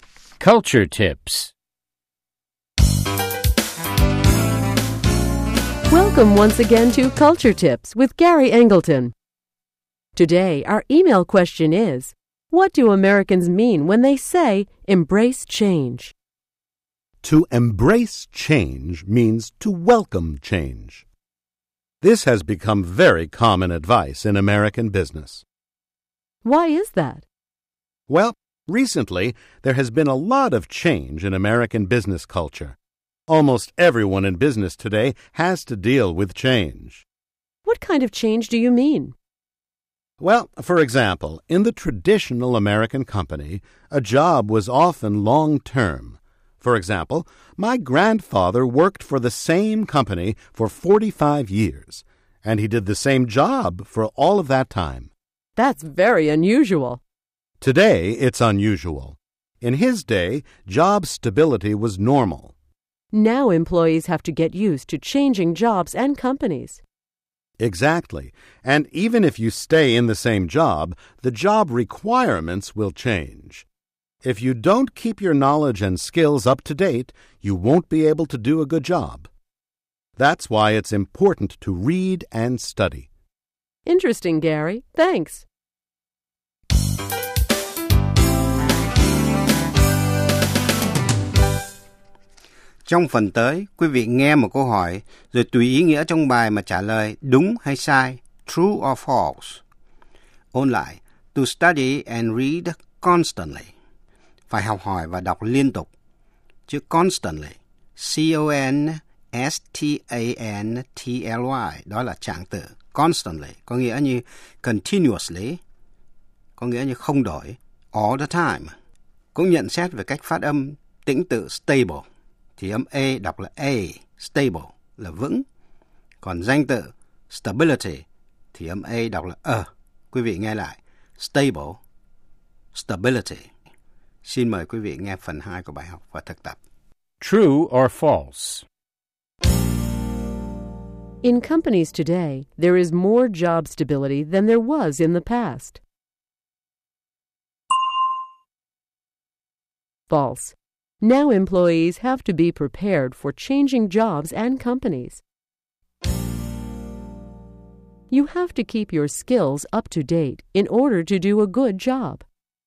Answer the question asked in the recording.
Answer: True. That's why you have to study and read constantly.